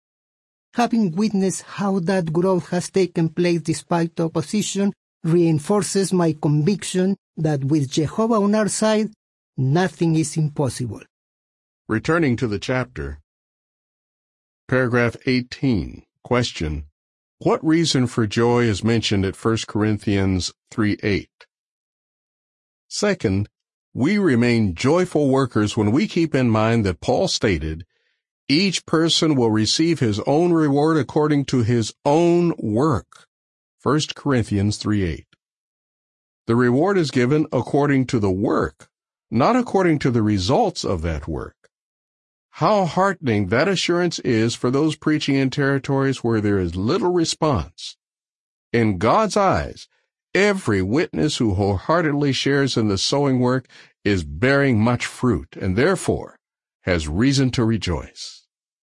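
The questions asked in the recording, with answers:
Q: what reason for joy is mentioned at 1 Corinthians 3:8?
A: Each person is rewarded according to his own work, not its results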